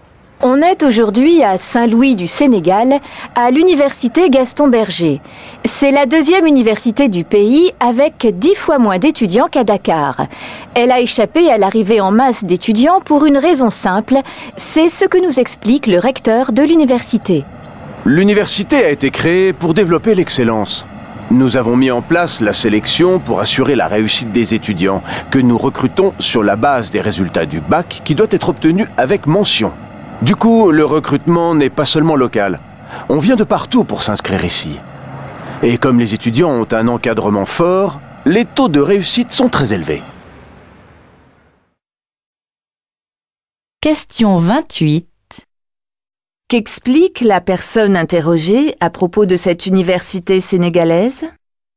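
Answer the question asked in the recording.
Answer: Elle sélectionne ses étudiants (bac avec mention), d'où de forts taux de réussite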